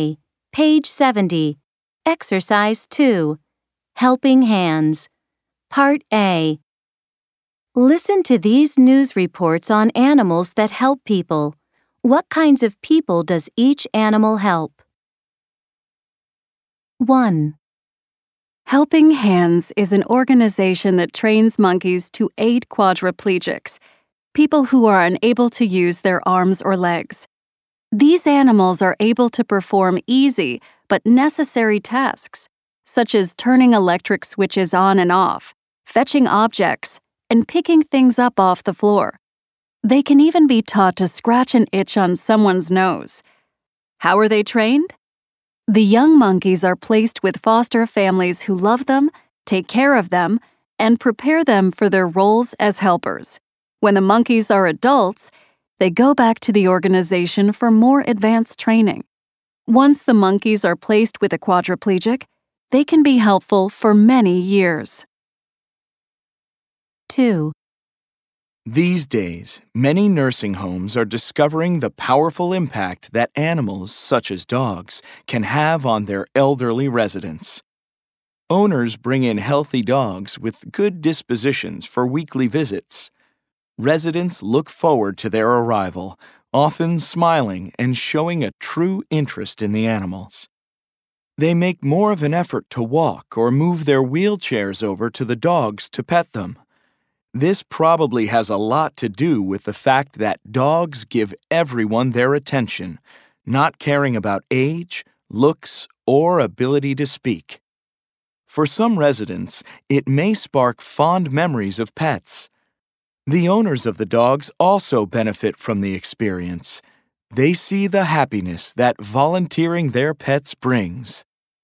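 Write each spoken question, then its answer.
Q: What kinds of people does each animal help?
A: Monkeys help quadriplegics, people who can't use their arms or legs

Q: What kinds of people does each animal help?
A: Dogs help elderly residents of nursing homes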